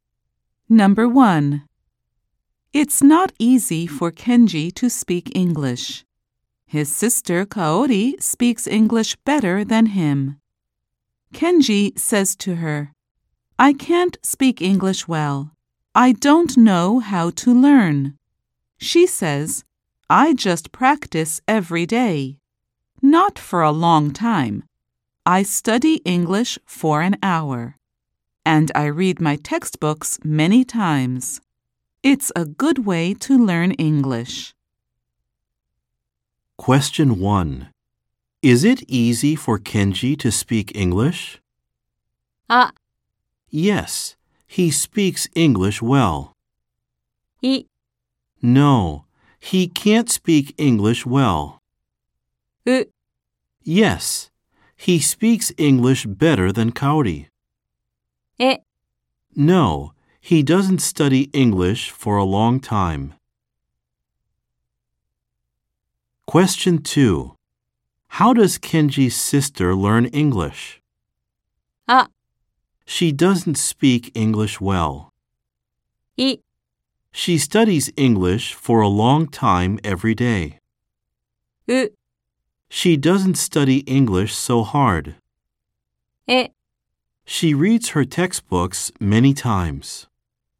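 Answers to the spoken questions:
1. い: No, he can't speak English well.
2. え: She reads her textbooks many times.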